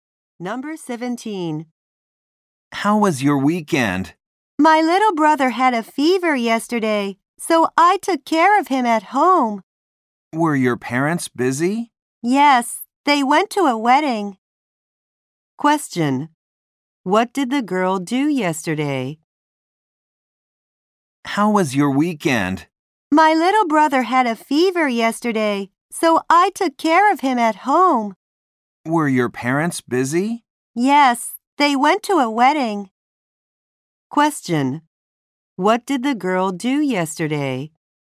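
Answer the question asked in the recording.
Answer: She took care of her little brother at home.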